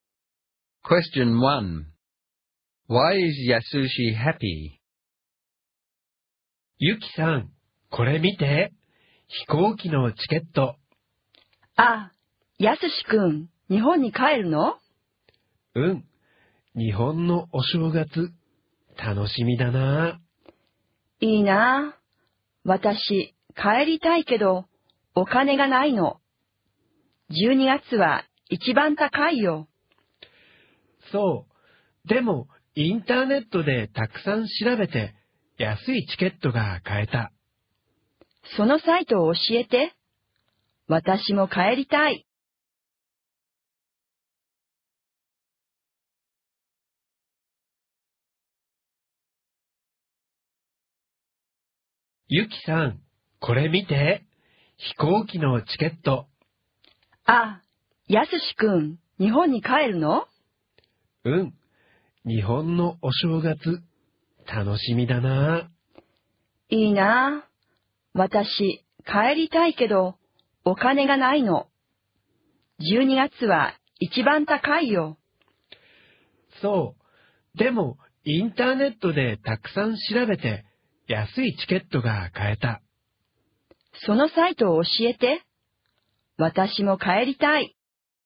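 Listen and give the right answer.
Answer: He is going home to Japan for New Year and found a cheap ticket online after searching a lot.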